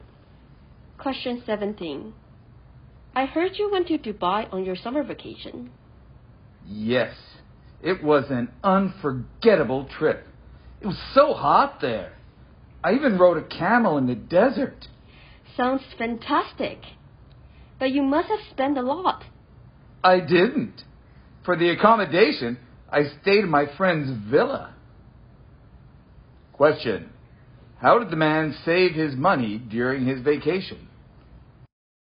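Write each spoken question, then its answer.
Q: How did the man save his money during his vacation?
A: He stayed in his friend's villa.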